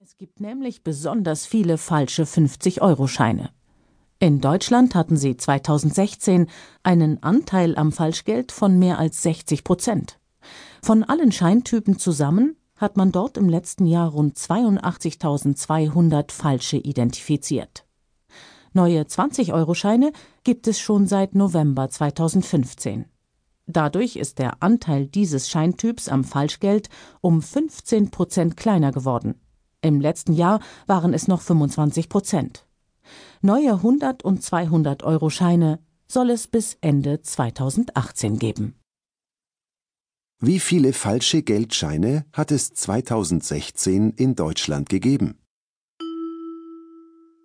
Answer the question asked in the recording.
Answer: Rund 82.200 Geldscheine.